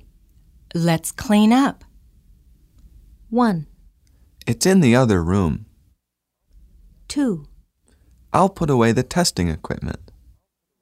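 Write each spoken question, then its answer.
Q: Let's clean up.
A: 2: I'll put away the testing equipment.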